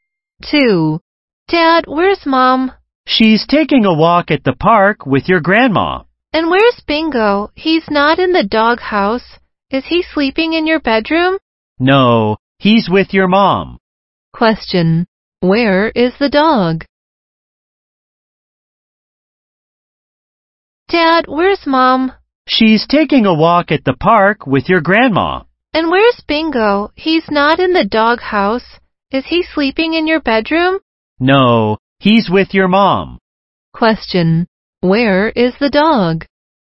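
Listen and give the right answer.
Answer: At the park with Mom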